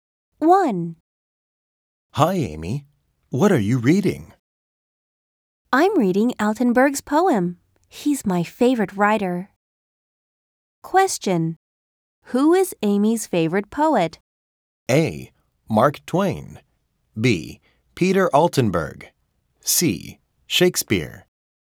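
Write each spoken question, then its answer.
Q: Who is Amy's favorite poet?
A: B: Peter Altenburg.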